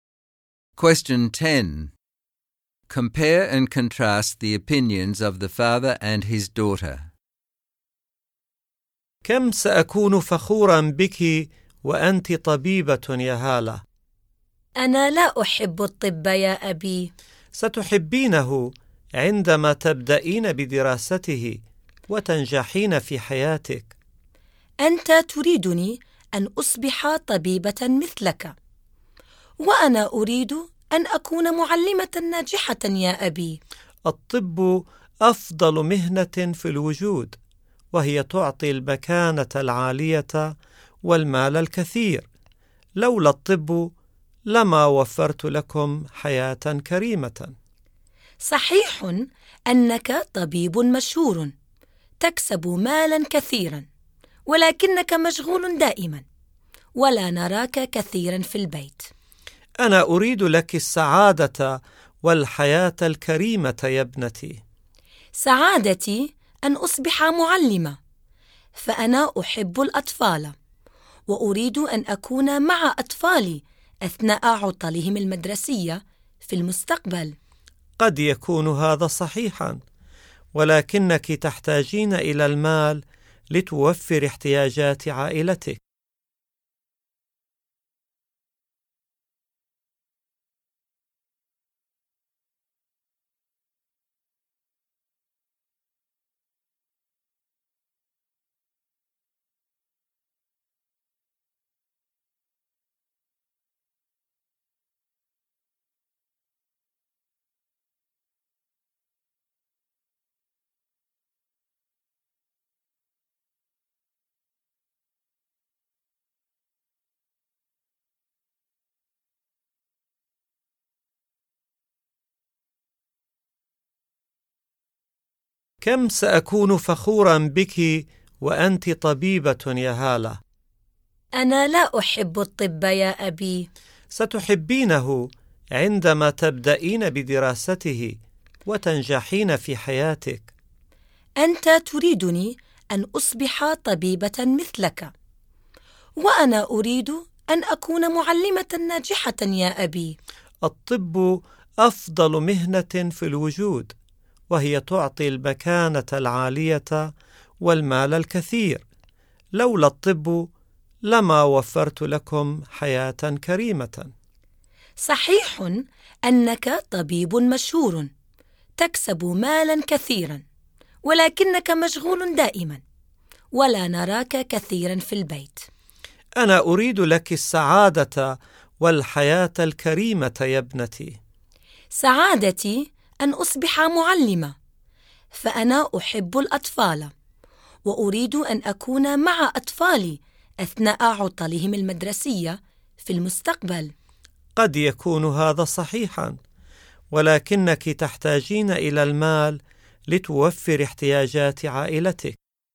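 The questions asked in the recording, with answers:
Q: Compare and contrast the opinions of the father and his daughter.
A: Both want a good life for her. The father wants her to be a doctor because medicine brings status and money. Hala wants to be a teacher because she loves children and wants time with her family, since her father is always busy.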